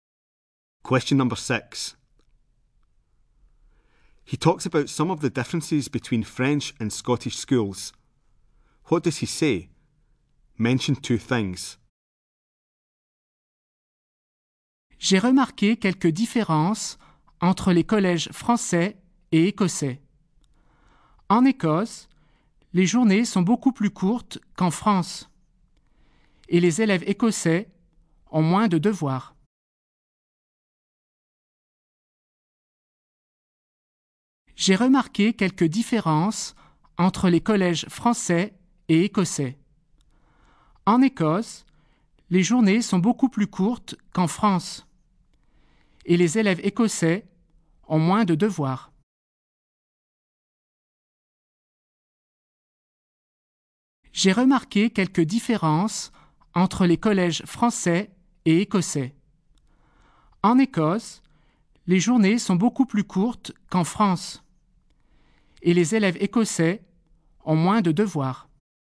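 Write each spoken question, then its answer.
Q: What does he say? Mention 2 things.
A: School days in Scotland are much shorter; Scottish pupils have less homework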